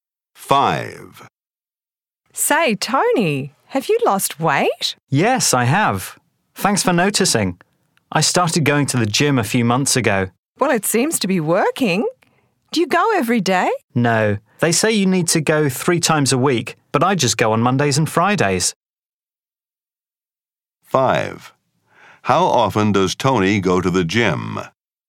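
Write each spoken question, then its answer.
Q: How often does Tony go to the gym?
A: Twice a week (Mondays and Fridays)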